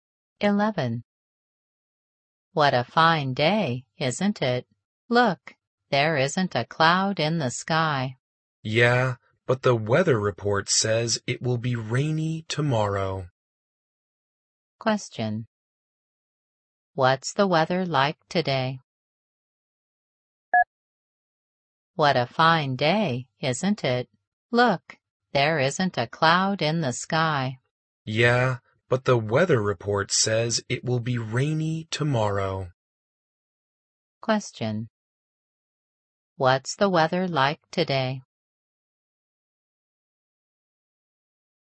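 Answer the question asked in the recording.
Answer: Sunny and fine, with no clouds.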